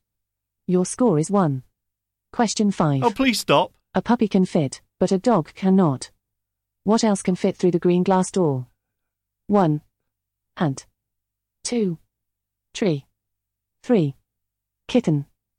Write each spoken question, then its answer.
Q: What else can fit through the green glass door?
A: answer is correct.